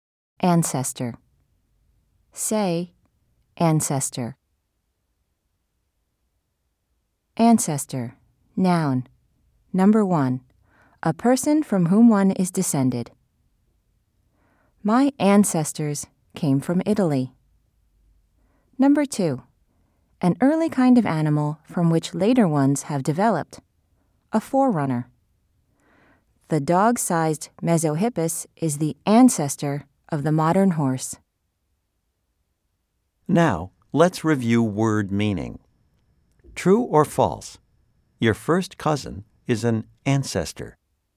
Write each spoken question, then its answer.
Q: True or false? Your first cousin is an ancestor.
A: If you said false, you are right.